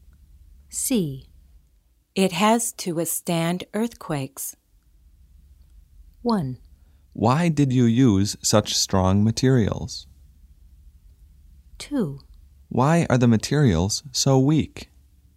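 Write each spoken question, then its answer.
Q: It has to withstand earthquakes.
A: 1: Why did you use such strong materials?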